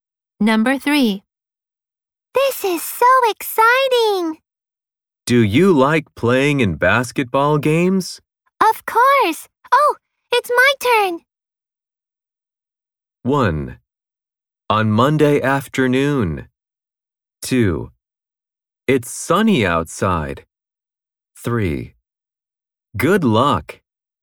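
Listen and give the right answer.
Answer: 3: Good luck.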